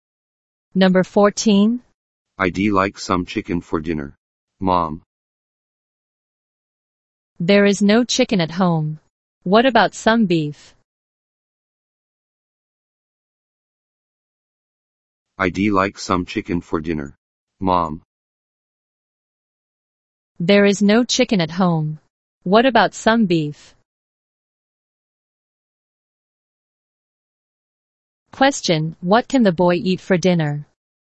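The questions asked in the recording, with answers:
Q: Question, what can the boy eat for dinner?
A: Beef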